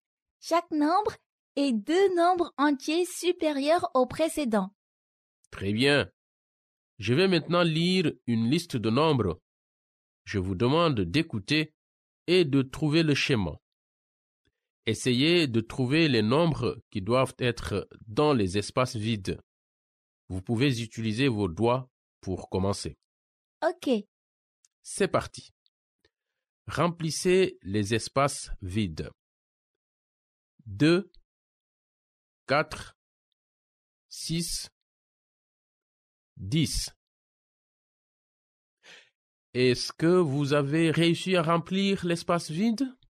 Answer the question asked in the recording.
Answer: Je crois que c'était 8.